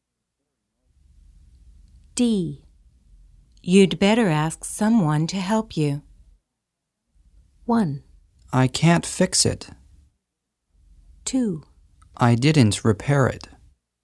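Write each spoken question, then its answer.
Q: You'd better ask someone to help you.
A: 1: I can't fix it.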